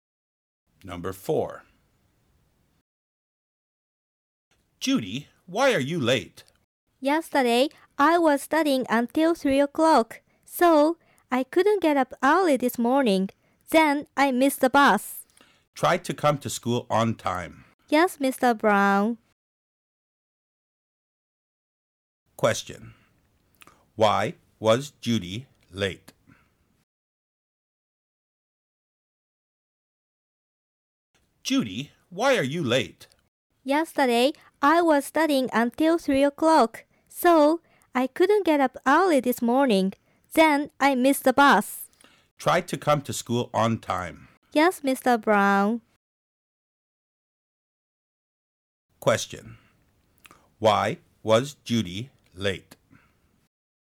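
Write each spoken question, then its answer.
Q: Question. Why was Judy late?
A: She studied until 3 o'clock, couldn't get up early, and missed the bus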